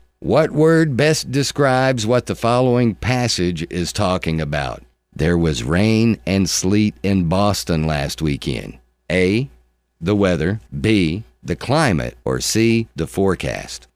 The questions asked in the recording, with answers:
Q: What word best describes what the following passage is talking about?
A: The weather.